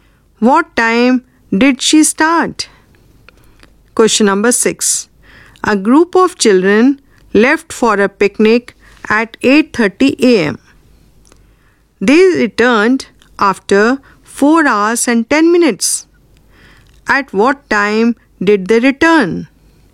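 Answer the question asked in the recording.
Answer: 12:40 p.m.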